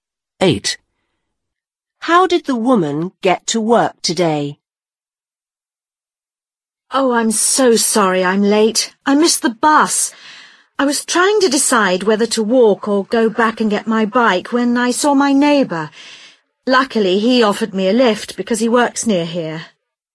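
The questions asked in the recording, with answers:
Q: How did the woman get to work today?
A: Her neighbour gave her a lift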